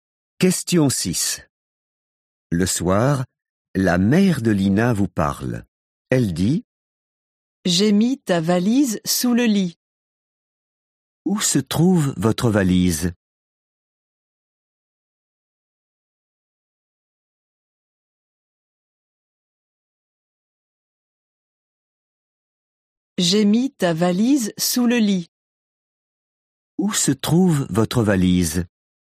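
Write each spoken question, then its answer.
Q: Où se trouve votre valise?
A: sous le lit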